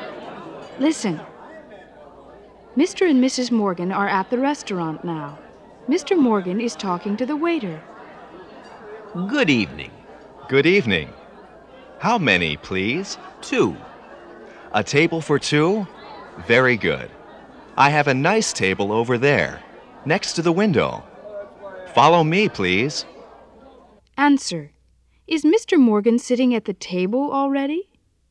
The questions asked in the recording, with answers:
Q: Is Mr. Morgan sitting at the table already?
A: No, he's not.